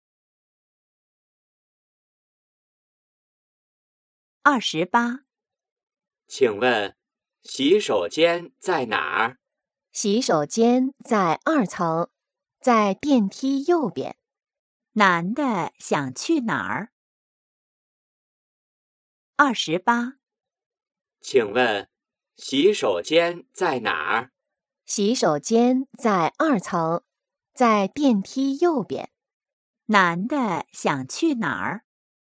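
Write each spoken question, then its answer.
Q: 男的想去哪儿?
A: 洗手间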